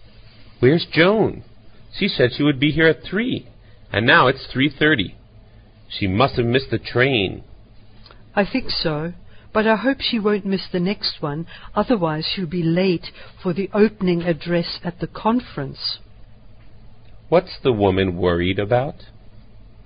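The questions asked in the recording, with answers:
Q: What's the woman worried about?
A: Joan will be late for the opening address at the conference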